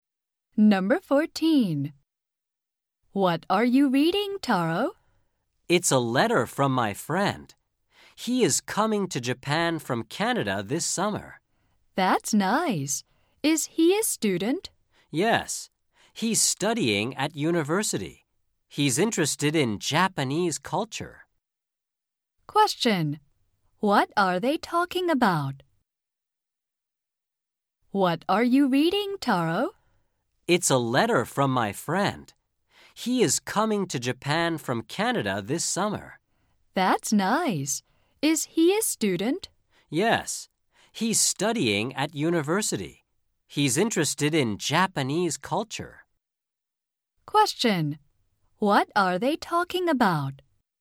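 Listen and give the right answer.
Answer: Taro's friend from Canada, who is coming to Japan this summer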